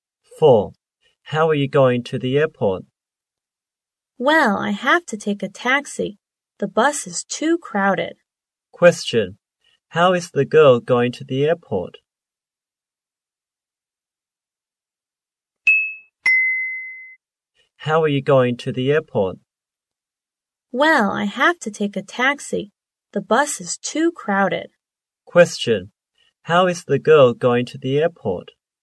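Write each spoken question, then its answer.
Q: Question. How is the girl going to the airport?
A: By taxi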